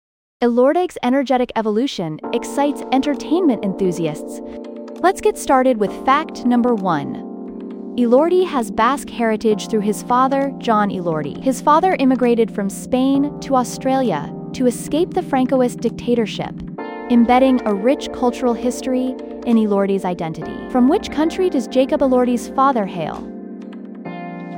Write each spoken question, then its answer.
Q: From which country does Jacob Elordi's father hail?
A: Correct answer, Spain.